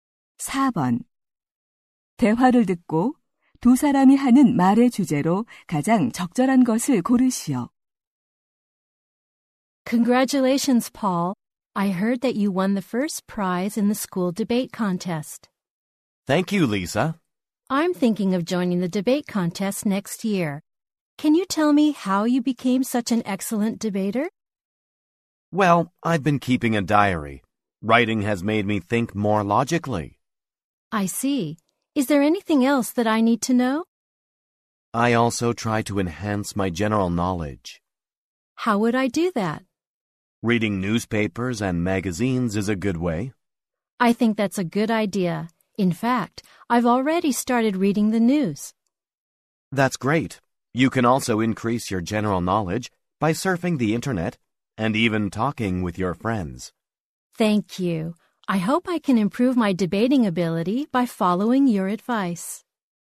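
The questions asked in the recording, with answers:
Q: 대화를 듣고 두 사람이 하는 말의 주제로 가장 적절한 것을 고르시오.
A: 토론을 잘하는 방법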